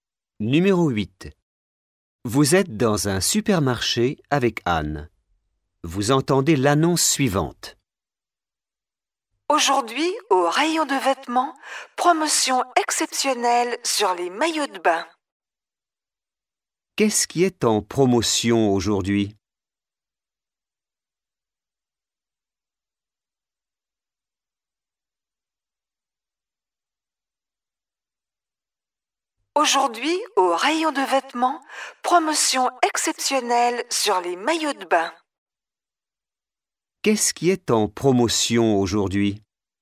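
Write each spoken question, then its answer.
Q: Qu'est-ce qui est en promotion aujourd'hui ?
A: Les maillots de bain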